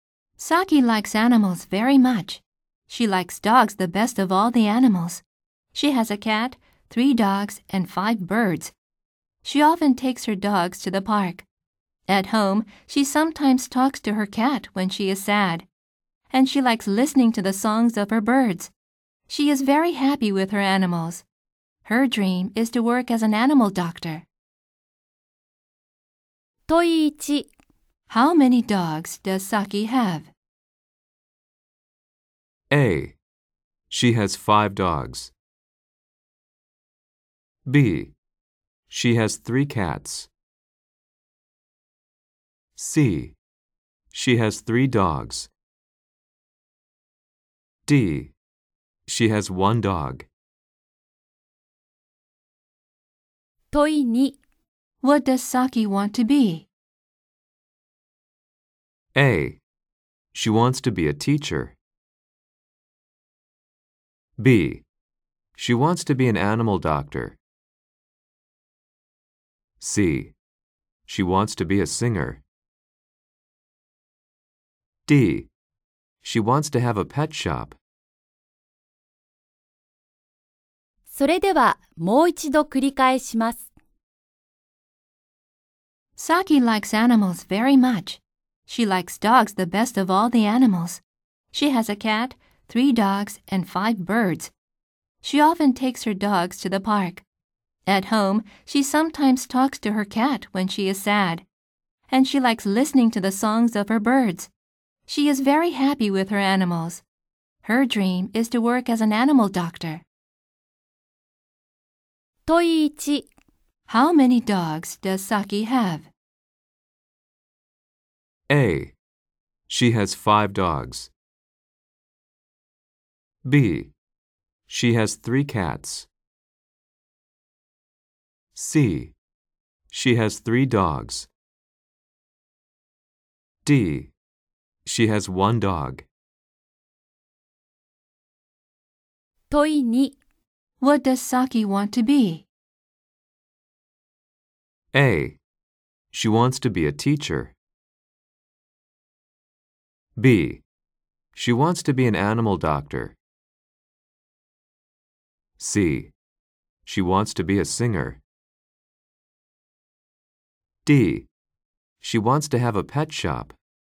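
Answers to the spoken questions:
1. C: She has 3 dogs.
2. B: She wants to be an animal doctor.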